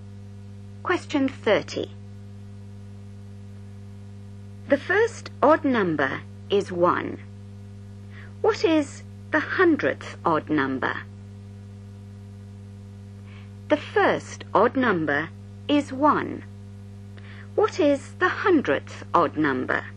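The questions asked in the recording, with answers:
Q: What is the hundredth odd number?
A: 199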